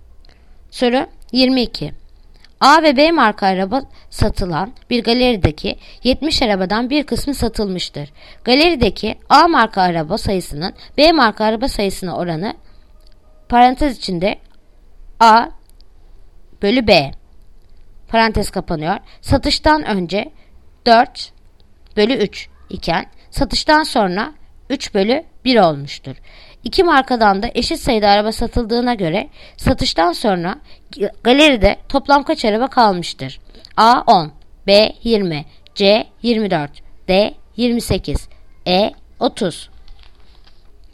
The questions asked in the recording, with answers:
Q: İki markadan da eşit sayıda araba satıldığına göre satıştan sonra galeride toplam kaç araba kalmıştır?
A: Yanıt Bursa 20.